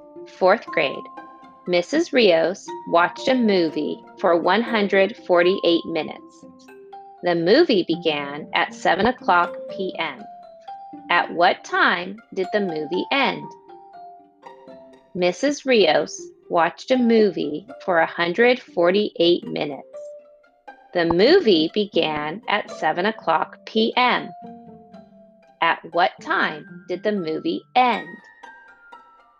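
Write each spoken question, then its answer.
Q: At what time did the movie end?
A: 9:28 p.m.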